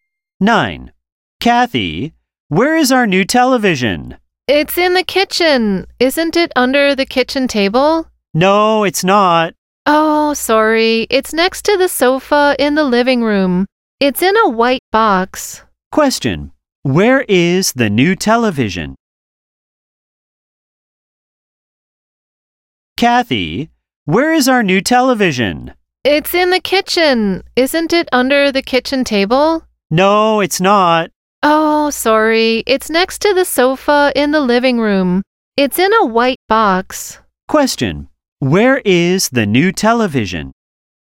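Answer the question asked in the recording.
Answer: Next to the sofa in the living room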